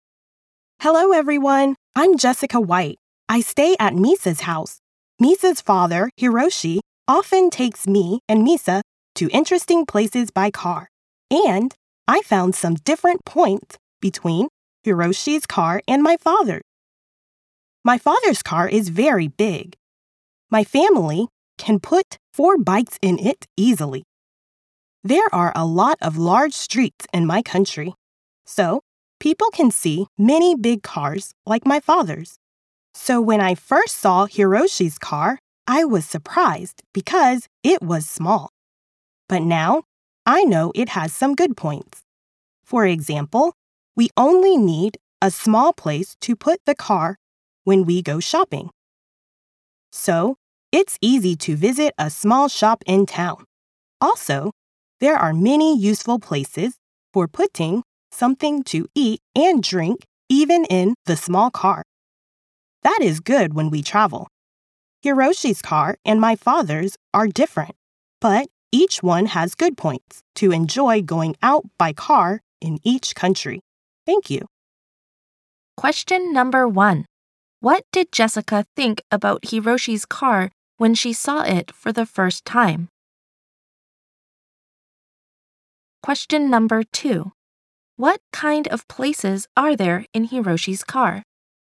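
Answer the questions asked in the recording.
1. She was surprised because it was small.
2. Many useful places for putting something to eat and drink.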